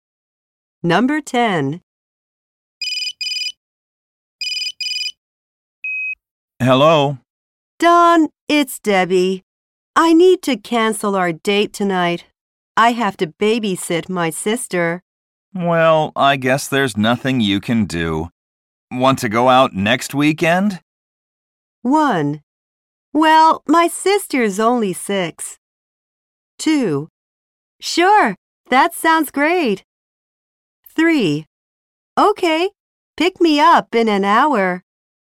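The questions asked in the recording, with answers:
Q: Want to go out next weekend?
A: 2: Sure, that sounds great.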